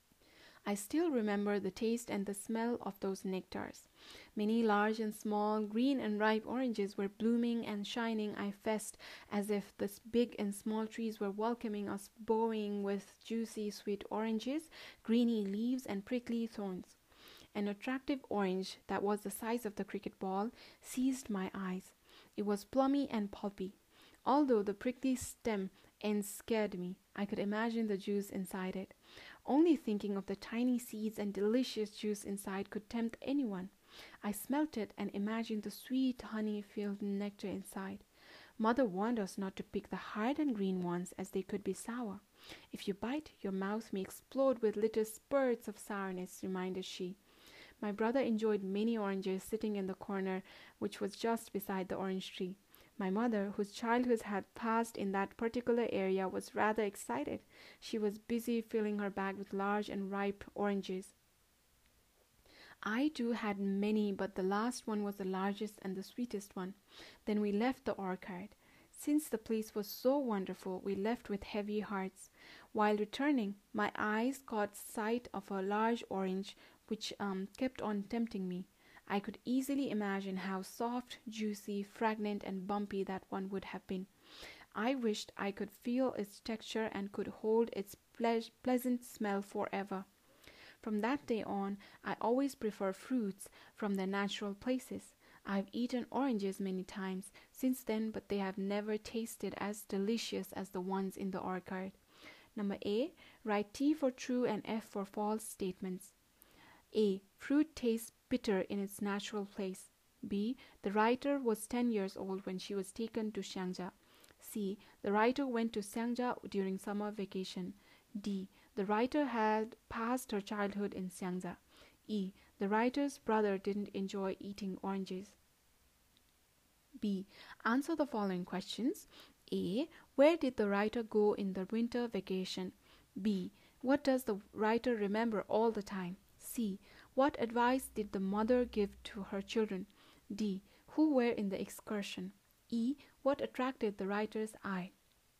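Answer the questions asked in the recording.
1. Not to pick the hard and green oranges because they could be sour
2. An attractive orange the size of a cricket ball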